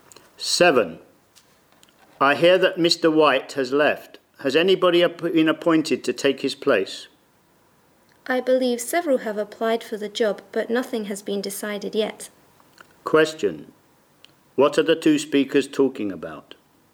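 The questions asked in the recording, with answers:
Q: What are the two speakers talking about?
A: Who will replace Mr. White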